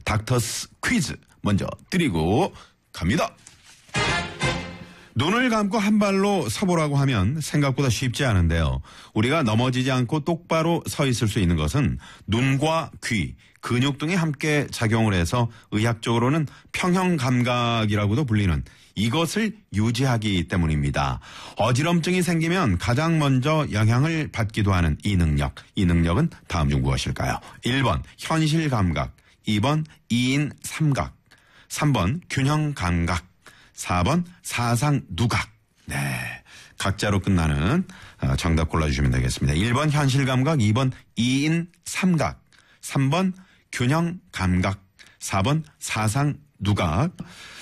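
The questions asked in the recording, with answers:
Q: 이 능력은 다음 중 무엇일까요?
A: 3: 균형감각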